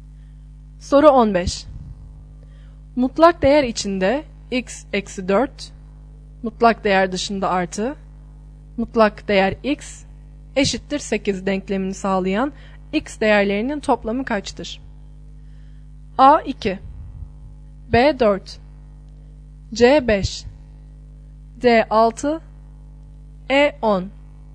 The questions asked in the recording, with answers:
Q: Mutlak değer içinde x eksi 4, mutlak değer dışında artı, mutlak değer x eşittir 8 denklemini sağlayan x değerlerinin toplamı kaçtır?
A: Doğru yanıt B şıkkı.